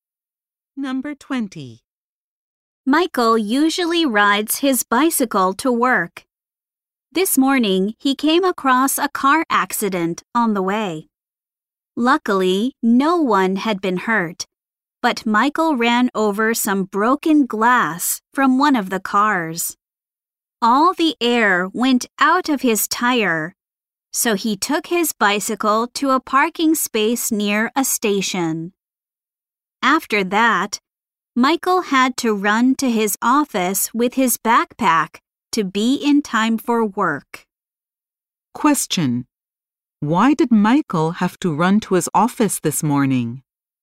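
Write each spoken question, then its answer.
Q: Why did Michael have to run to his office this morning?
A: His bicycle tire went flat from broken glass.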